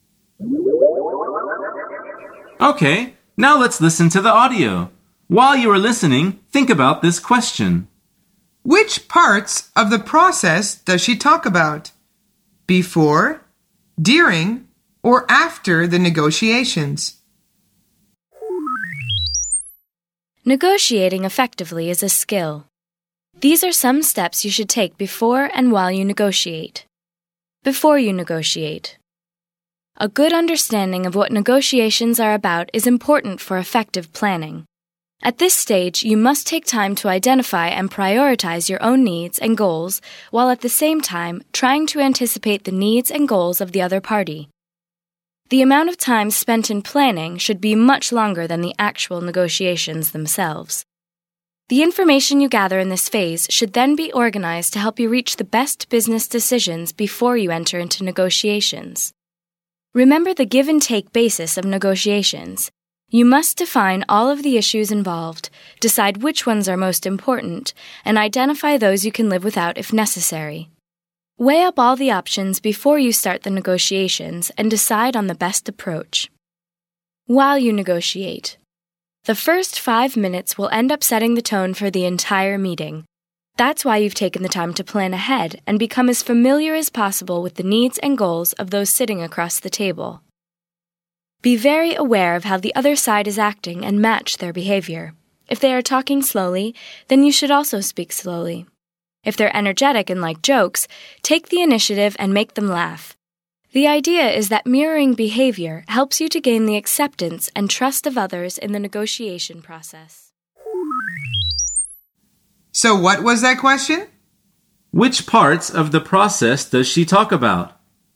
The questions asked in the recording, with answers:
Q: Which parts of the process does she talk about? Before, during, or after the negotiations?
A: The answer is before and during.